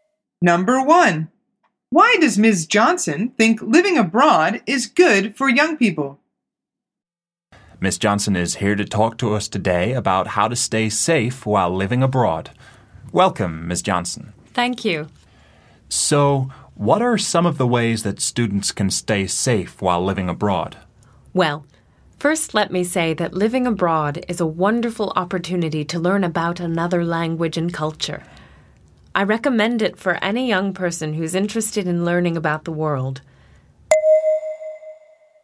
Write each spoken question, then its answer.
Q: why does Ms. Johnson think living abroad is good for young people?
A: The answer is because it's a good way to learn about the world.